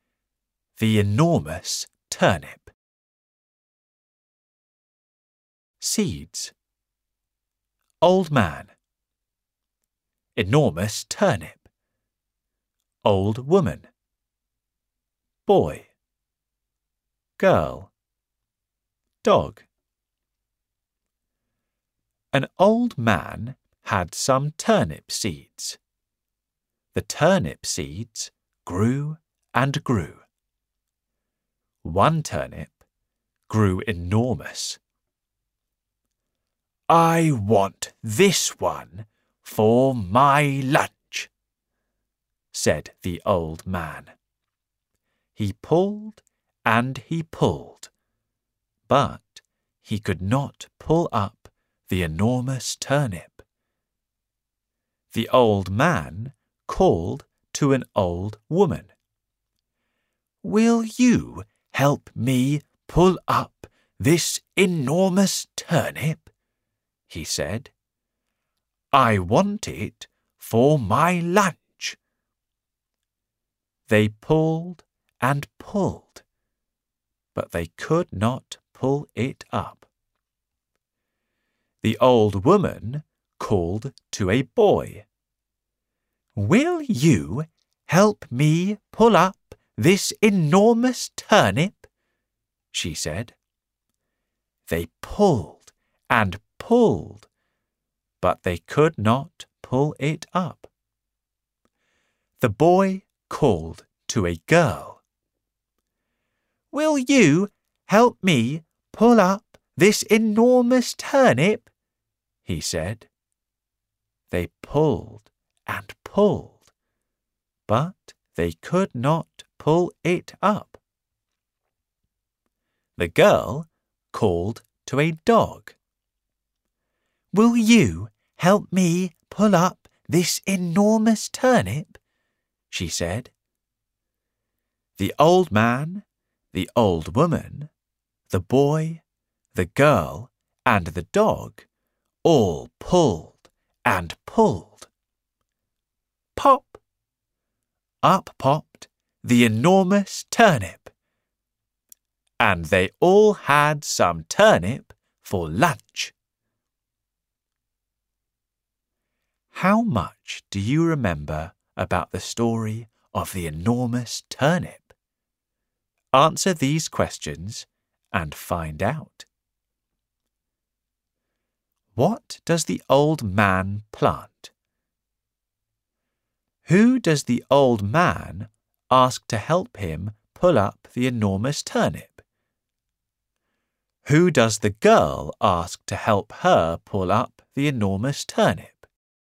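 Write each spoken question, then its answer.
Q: What does the old man plant?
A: Turnip seeds

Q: Who does the old man ask to help him pull up the enormous turnip?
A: An old woman

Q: Who does the girl ask to help her pull up the enormous turnip?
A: A dog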